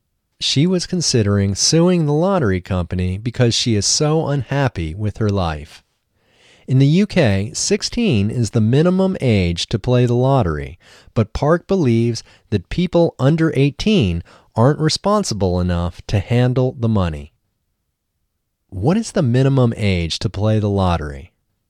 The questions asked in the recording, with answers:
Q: What is the minimum age to play the lottery?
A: In the UK, 16 is the minimum age to play the lottery.